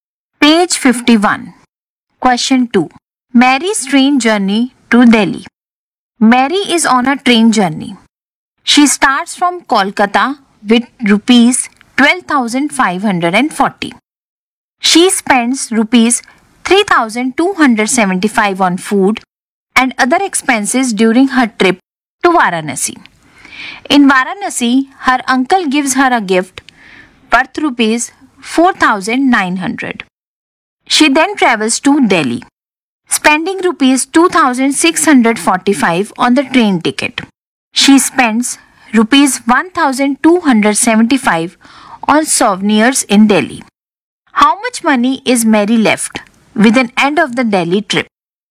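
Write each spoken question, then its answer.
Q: How much money is Mary left with an end of the Delhi trip?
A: Rupees 10,245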